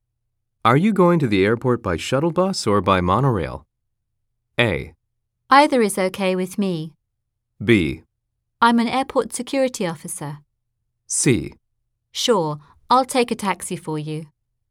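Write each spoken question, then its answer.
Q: Are you going to the airport by shuttle bus or by monorail?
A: A: Either is okay with me.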